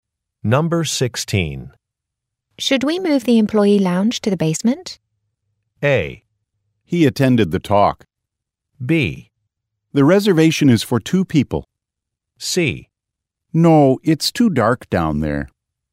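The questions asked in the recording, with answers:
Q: Should we move the employee lounge to the basement?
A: C: No, it's too dark down there.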